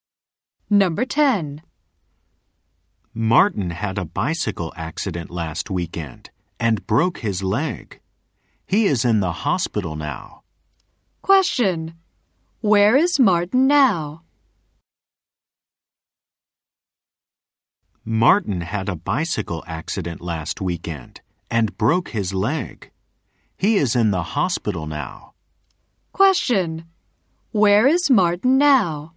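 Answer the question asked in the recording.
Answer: In the hospital.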